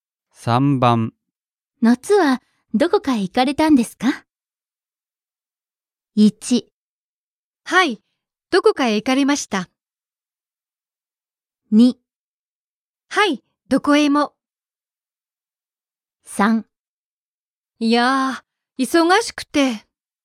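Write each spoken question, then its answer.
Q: 夏はどこか行かれたんですか?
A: 3: いやー、忙しくて。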